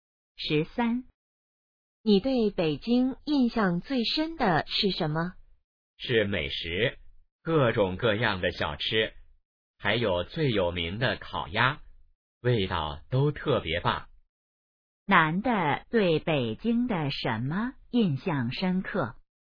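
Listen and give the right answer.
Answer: 美食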